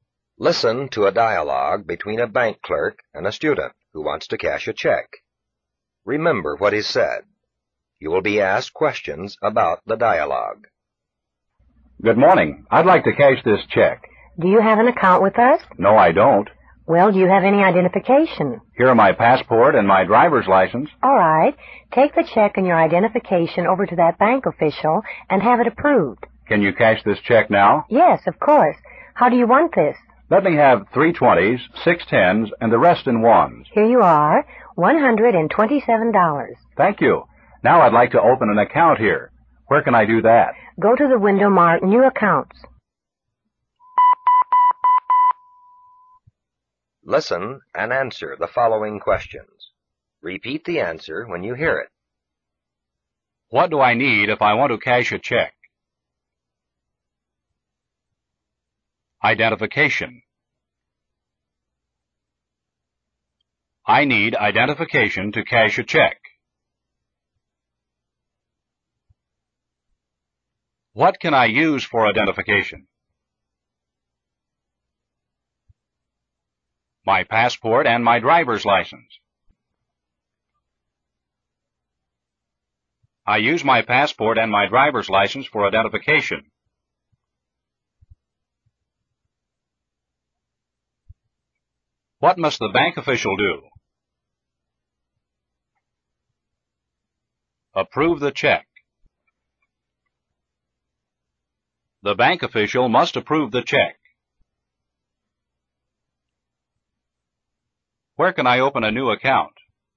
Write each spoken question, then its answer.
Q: What do I need if I want to cash a check?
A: Identification. I need identification to cash a check.

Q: What can I use for identification?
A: My passport and my driver's license.

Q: What must the bank official do?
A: Approve the check. The bank official must approve the check.

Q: Where can I open a new account?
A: At the window marked New Accounts.